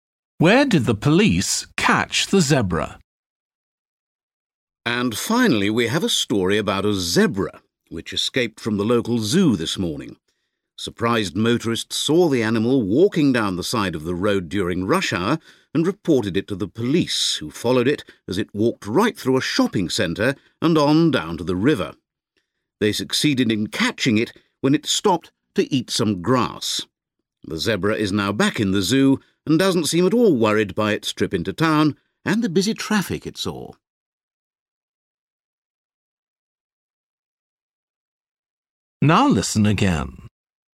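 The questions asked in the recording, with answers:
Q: Where did the police catch the zebra?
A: By the river, where it stopped to eat some grass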